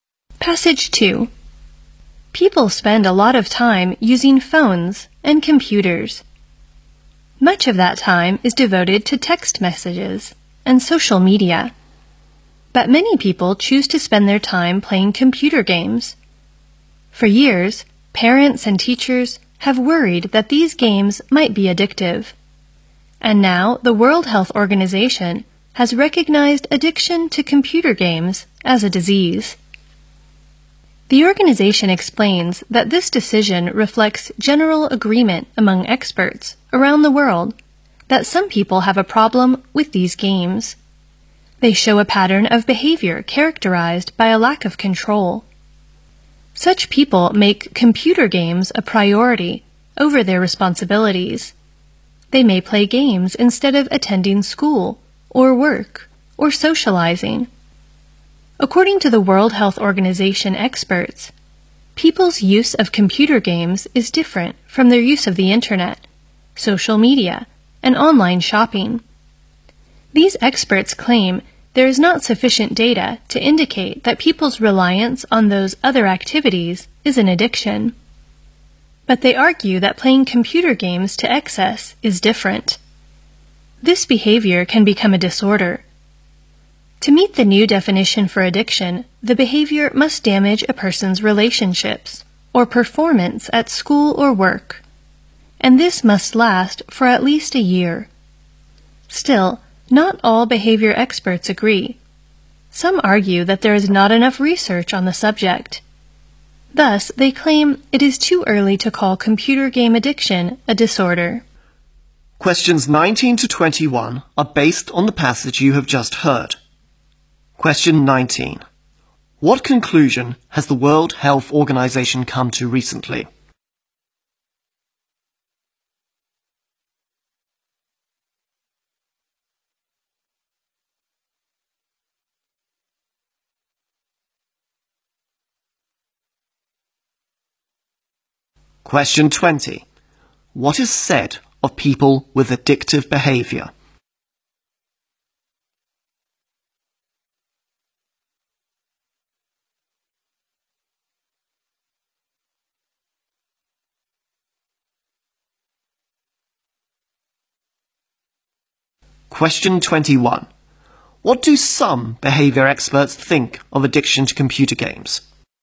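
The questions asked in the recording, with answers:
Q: What conclusion has the World Health Organization come to recently?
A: Addiction to computer games is a disease

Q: What is said of people with addictive behavior?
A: They lack control and put games before their responsibilities

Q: What do some behavior experts think of addiction to computer games?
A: It is too early to call it a disorder because there is not enough research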